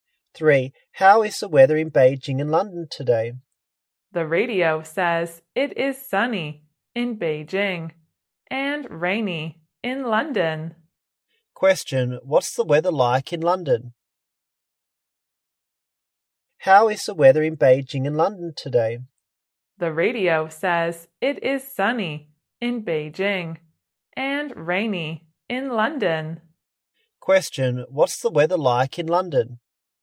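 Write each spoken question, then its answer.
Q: what's the weather like in London?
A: Rainy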